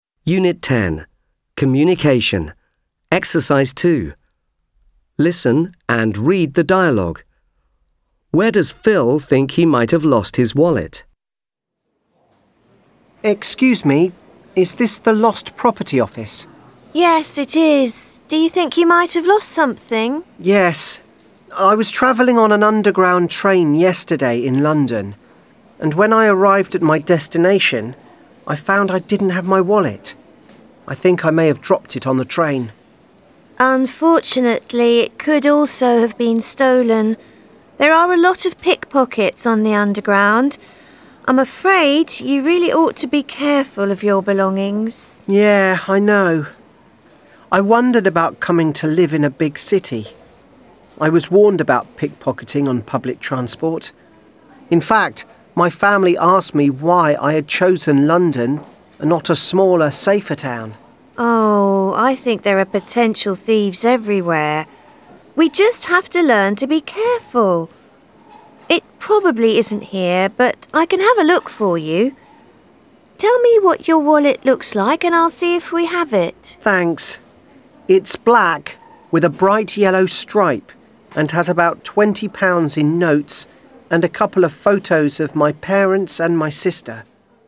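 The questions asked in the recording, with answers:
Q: Where does Phil think he might have lost his wallet?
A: On the underground train in London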